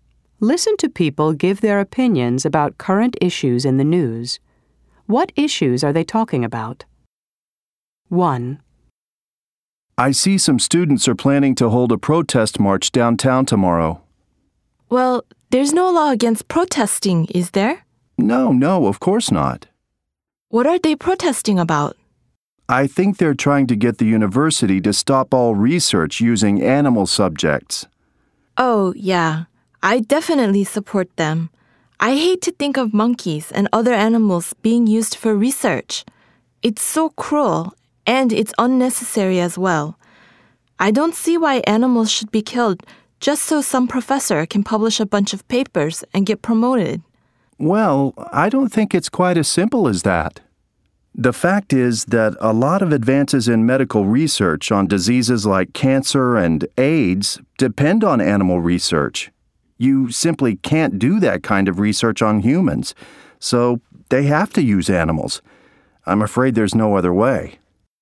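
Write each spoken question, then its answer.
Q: What issues are they talking about?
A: Using animals in university research (a student protest against animal research)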